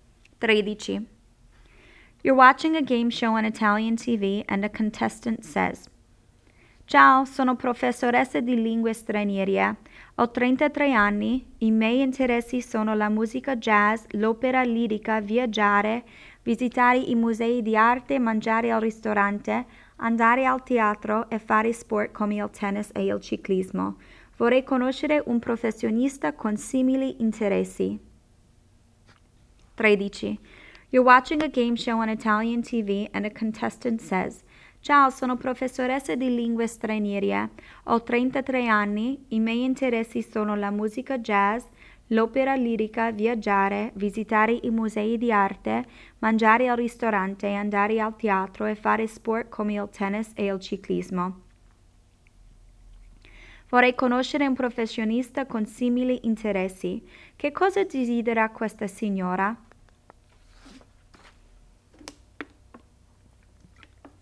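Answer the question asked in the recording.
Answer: Conoscere un professionista con interessi simili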